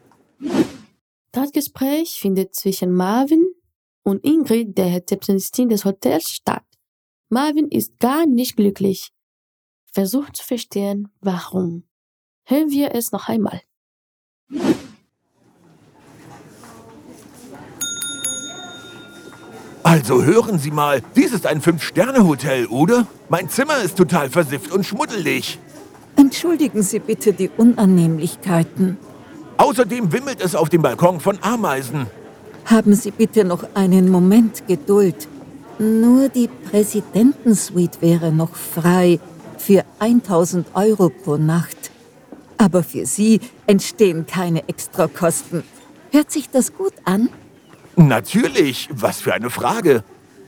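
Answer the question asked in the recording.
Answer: Sein Zimmer ist schmutzig und auf dem Balkon wimmelt es von Ameisen.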